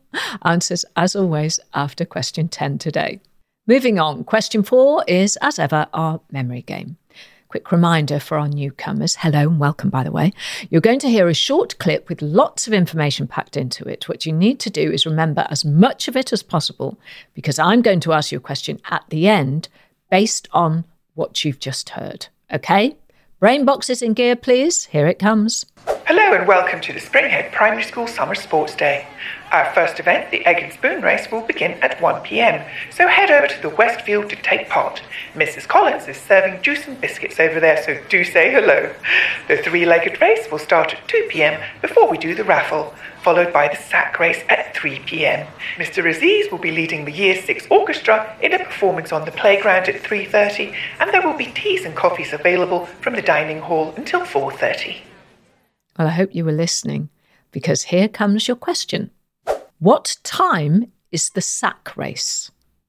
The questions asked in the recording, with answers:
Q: What time is the sack race?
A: The sack race was at three o'clock, 3 p.m.